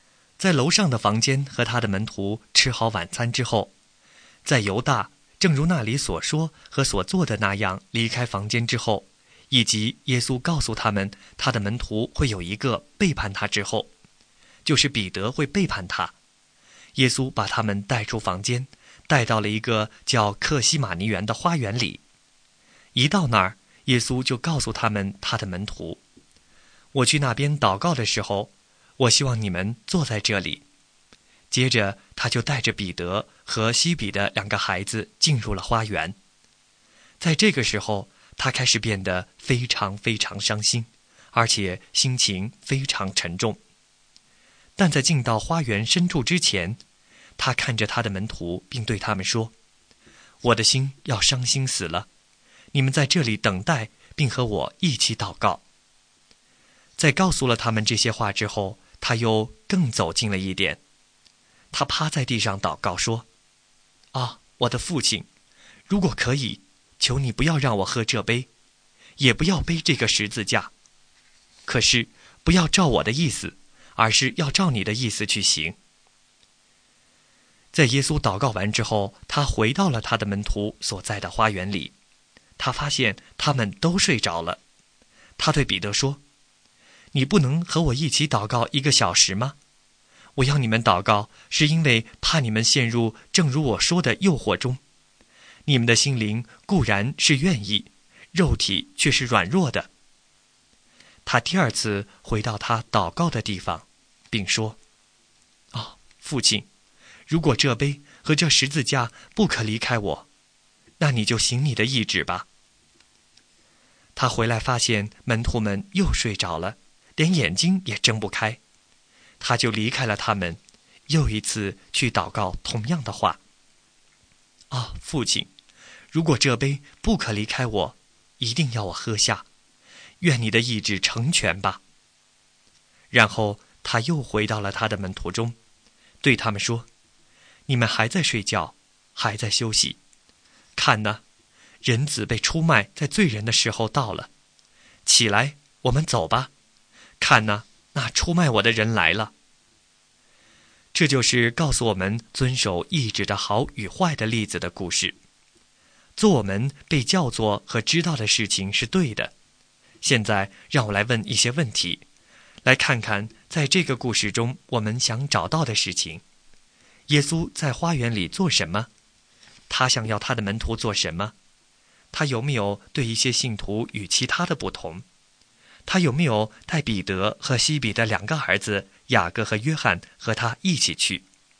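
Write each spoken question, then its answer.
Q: 耶稣在花园里做什么?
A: 祷告

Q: 他想要他的门徒做什么?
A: 在这里等待并和他一起祷告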